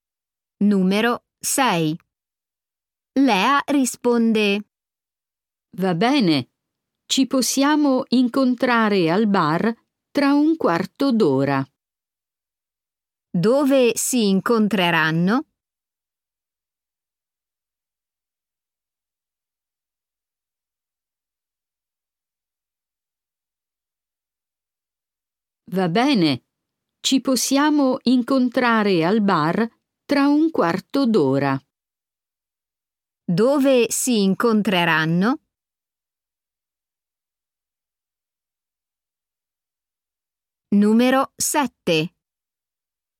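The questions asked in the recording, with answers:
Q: Dove si incontreranno?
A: al bar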